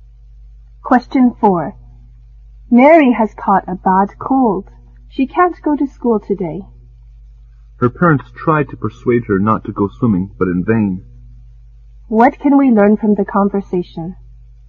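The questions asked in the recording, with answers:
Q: What can we learn from the conversation?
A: Mary went swimming against her parents' advice and caught a bad cold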